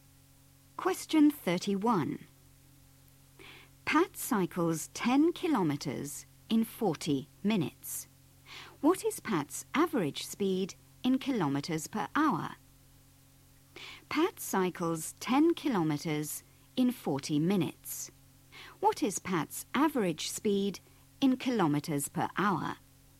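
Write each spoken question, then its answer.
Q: What is Pat's average speed in kilometers per hour?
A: 15 km/h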